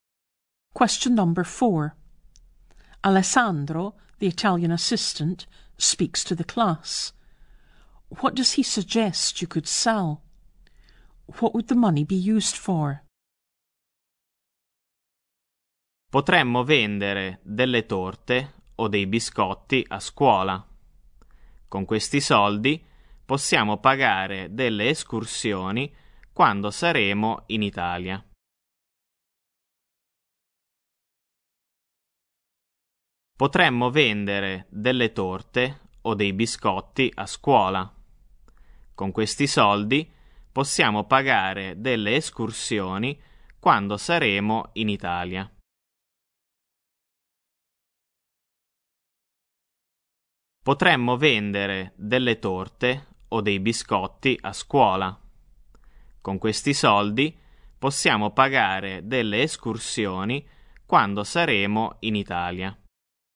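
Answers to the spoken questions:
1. Cakes or biscuits at school
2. To pay for excursions in Italy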